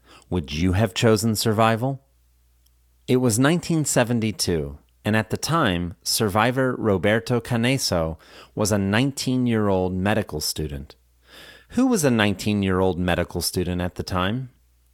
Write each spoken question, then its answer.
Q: Who was a 19-year-old medical student at the time?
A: At the time, survivor Roberto Canesso was a 19-year-old medical student.